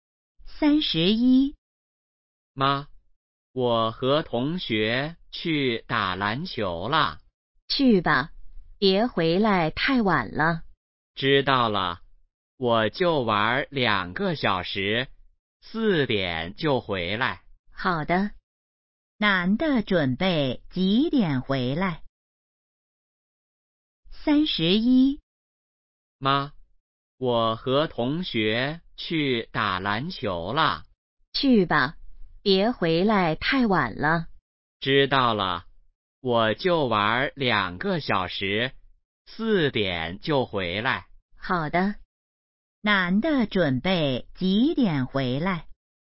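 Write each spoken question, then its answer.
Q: 男的准备几点回来?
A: 四点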